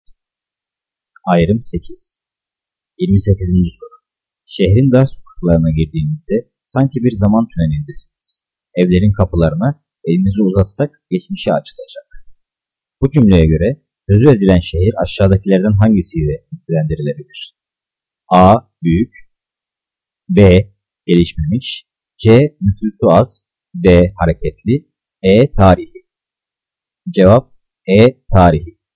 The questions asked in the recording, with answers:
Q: Bu cümleye göre sözü edilen şehir aşağıdakilerden hangisiyle nitelendirilebilir?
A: Cevap E. Tarihi.